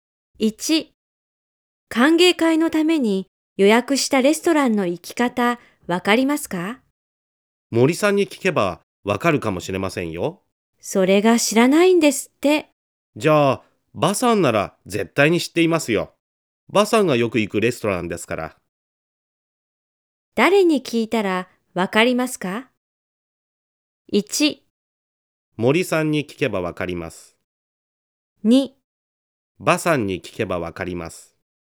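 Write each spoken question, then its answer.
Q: 誰に聞いたらわかりますか?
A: 2: バさんに聞けばわかります。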